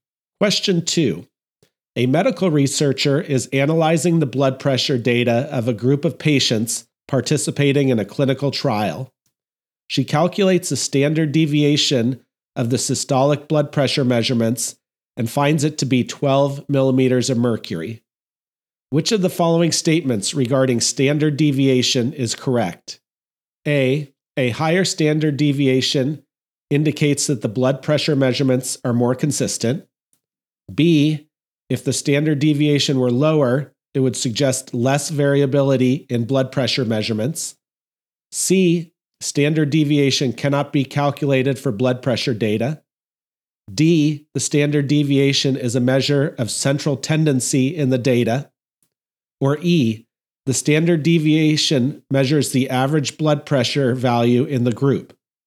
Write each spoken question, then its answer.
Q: Which of the following statements regarding standard deviation is correct?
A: The correct answer is B. If the standard deviation were lower, it would suggest less variability in blood pressure measurements.